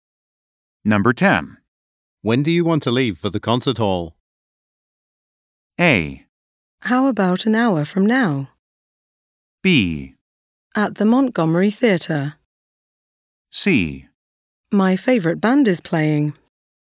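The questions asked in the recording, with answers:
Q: When do you want to leave for the concert hall?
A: A: How about an hour from now?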